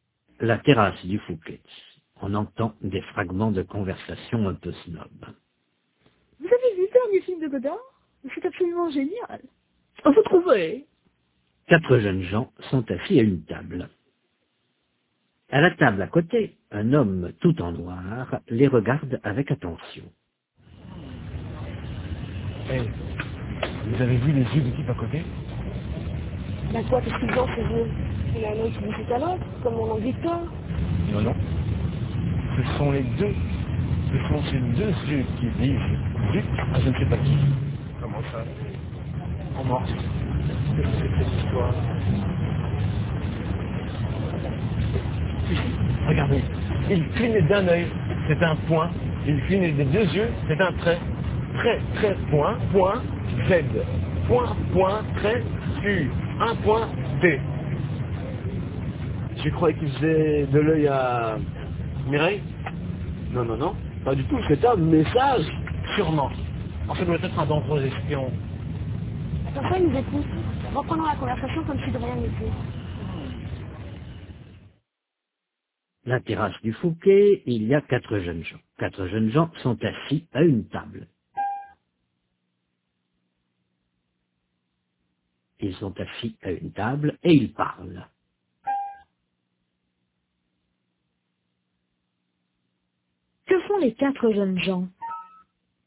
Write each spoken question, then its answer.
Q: Que font les quatre jeunes gens?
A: Ils parlent.